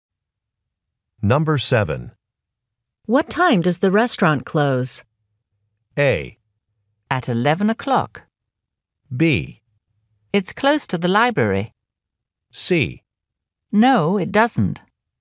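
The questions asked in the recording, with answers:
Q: What time does the restaurant close?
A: A: At 11 o'clock.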